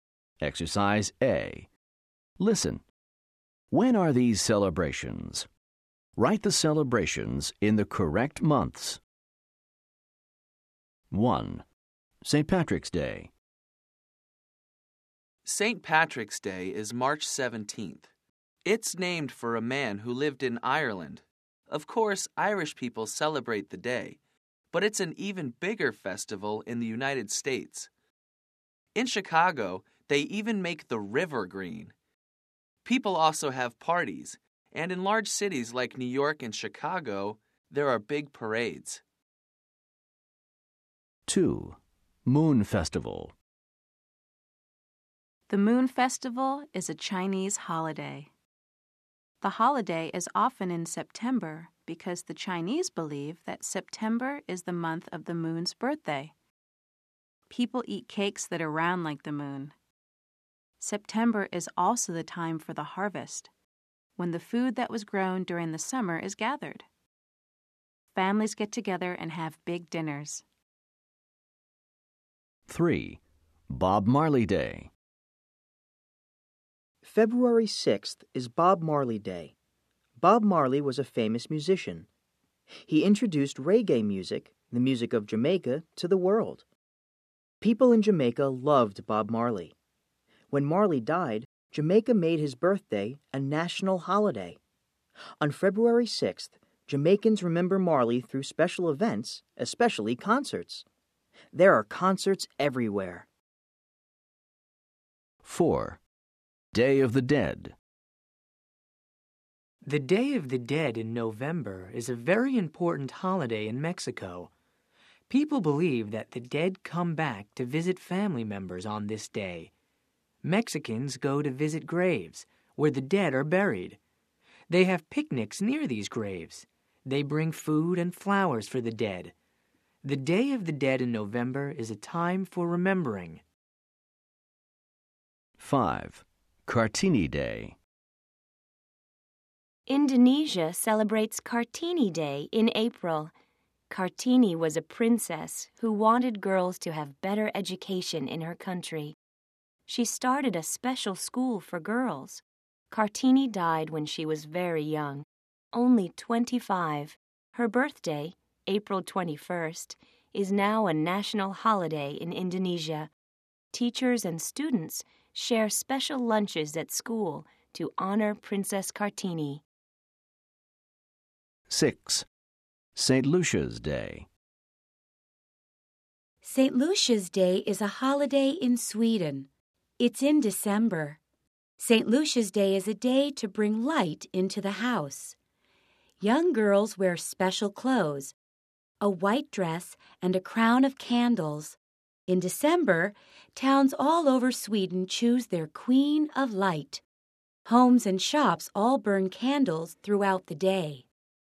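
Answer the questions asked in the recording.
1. March
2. September
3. February
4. November
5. April
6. December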